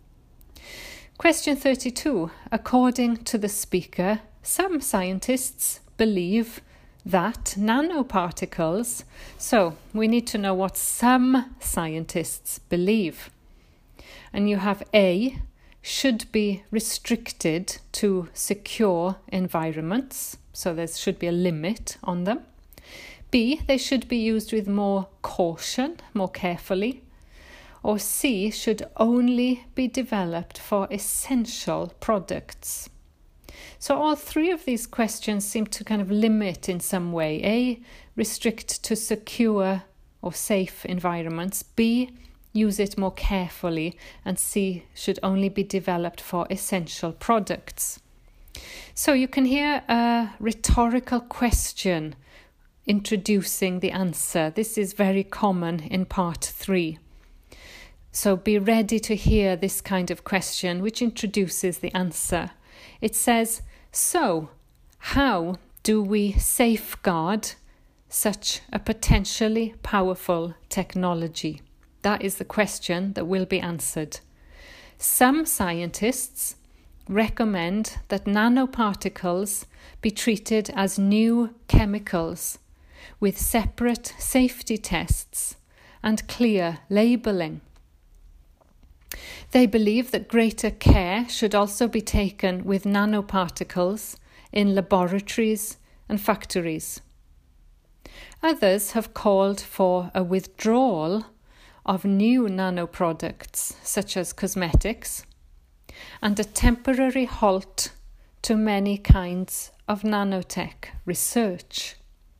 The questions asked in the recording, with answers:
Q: According to the speaker, some scientists believe that nanoparticles.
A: So the answer is B, they should be used with more caution.